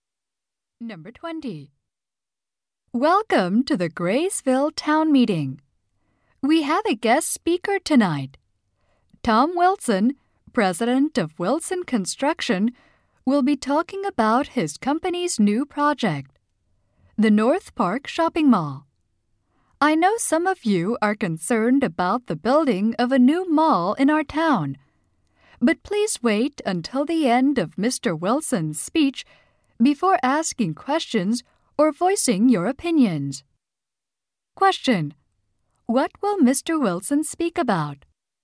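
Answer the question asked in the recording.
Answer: His company's new project, the North Park Shopping Mall.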